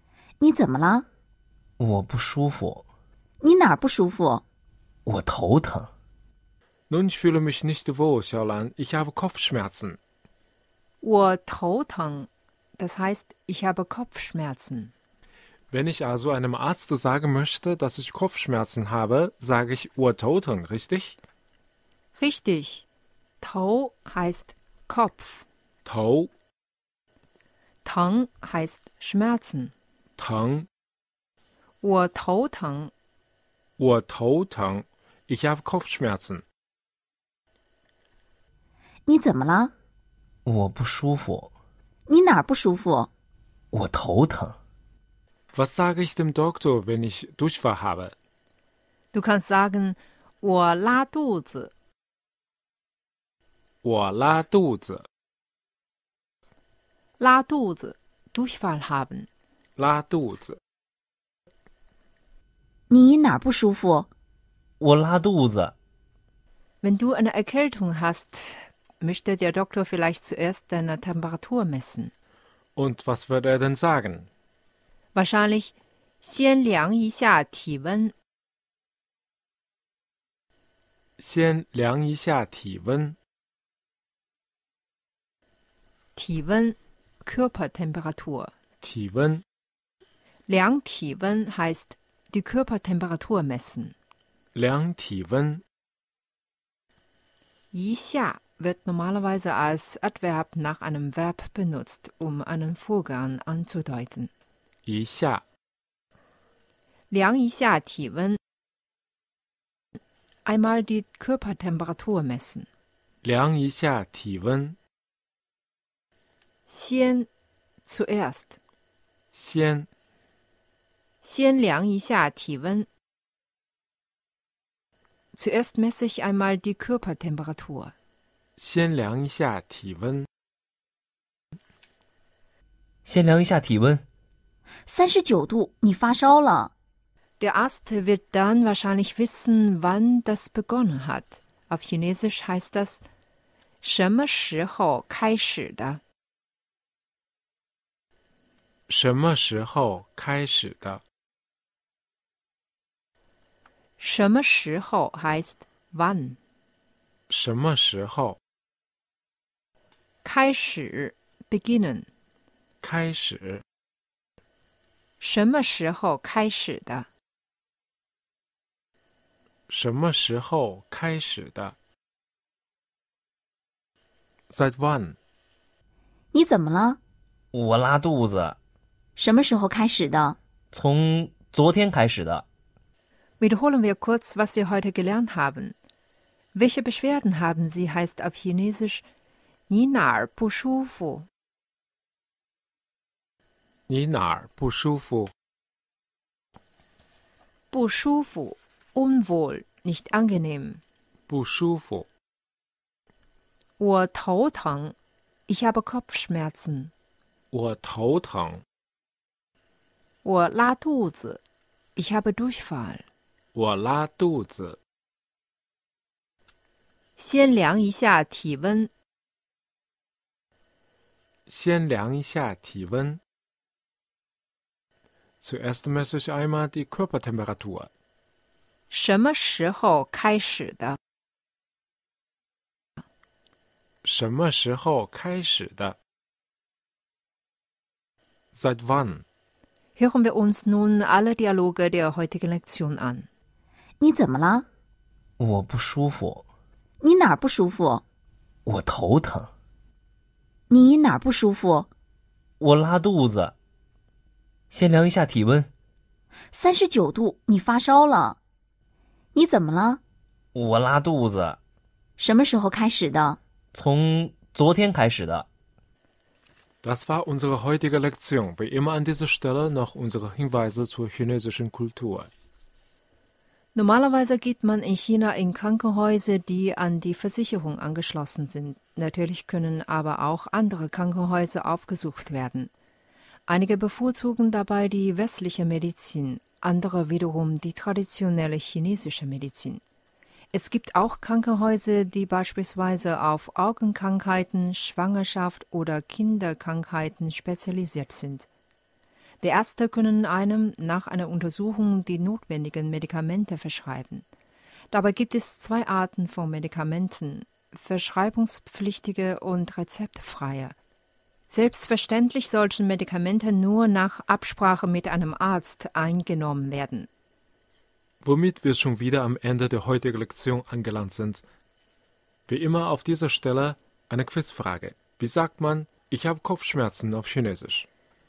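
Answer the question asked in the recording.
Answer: 我头疼 (wǒ tóu téng)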